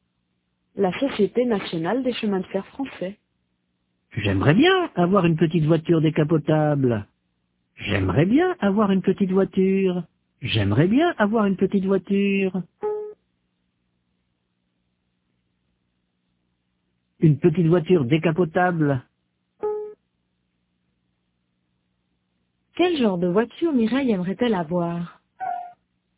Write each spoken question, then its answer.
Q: Quel genre de voiture Mireille aimerait-elle avoir?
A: Une petite voiture décapotable.